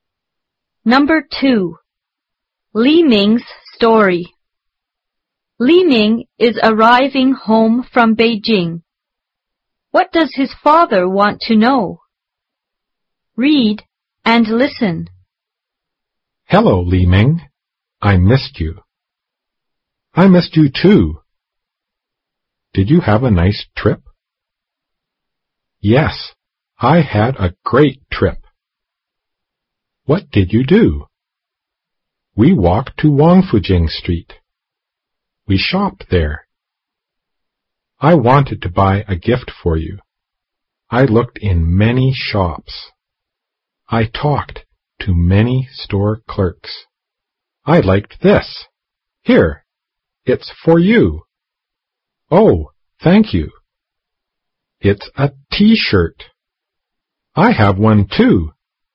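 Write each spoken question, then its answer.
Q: What does his father want to know?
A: Whether Li Ming had a nice trip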